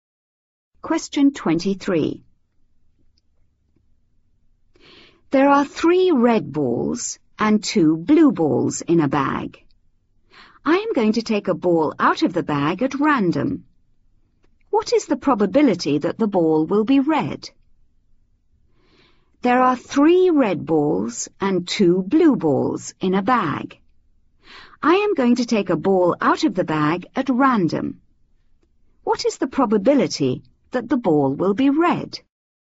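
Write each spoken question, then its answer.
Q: What is the probability that the ball will be red?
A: 3/5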